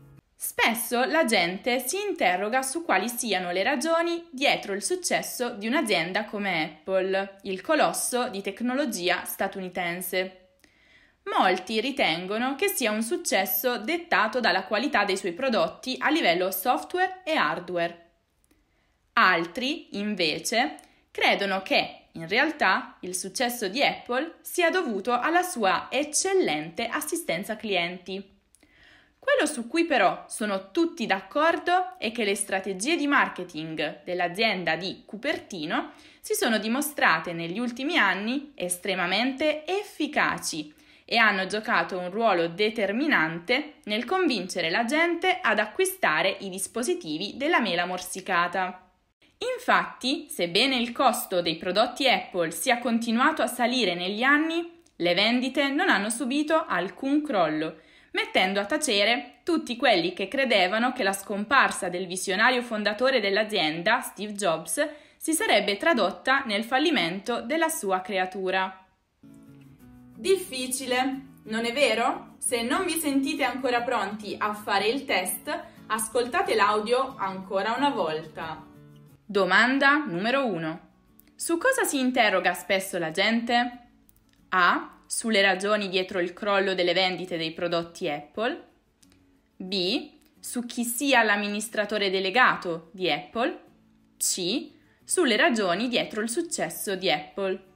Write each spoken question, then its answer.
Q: Su cosa si interroga spesso la gente?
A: La risposta corretta è C, le ragioni dietro il successo di Apple.